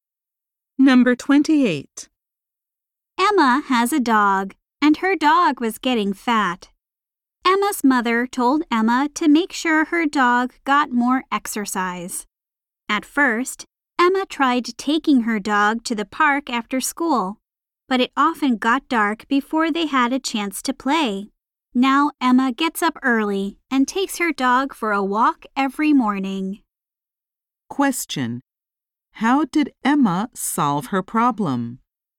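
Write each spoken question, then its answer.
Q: How did Emma solve her problem?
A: She walks her dog early every morning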